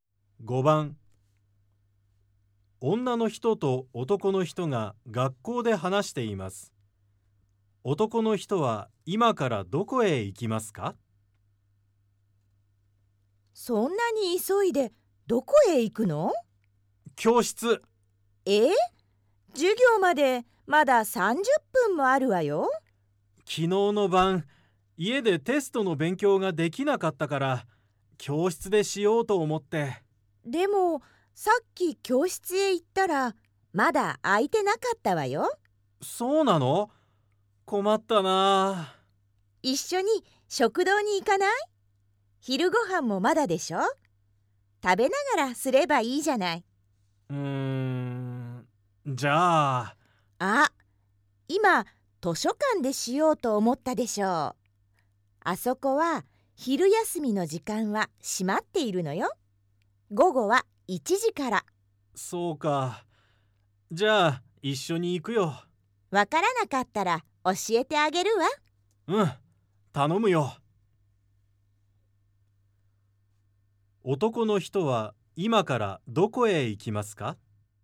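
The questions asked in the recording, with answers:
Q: 男の人は今からどこへ行きますか?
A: 食堂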